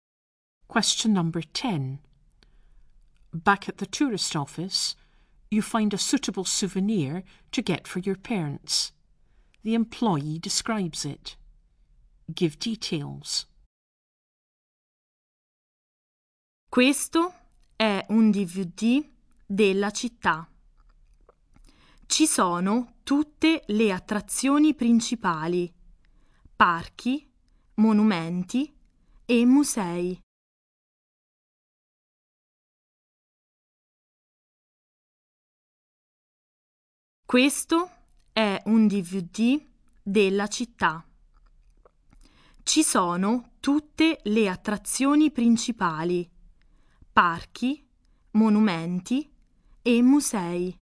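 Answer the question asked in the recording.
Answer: A DVD of the city with all the main attractions: parks, monuments and museums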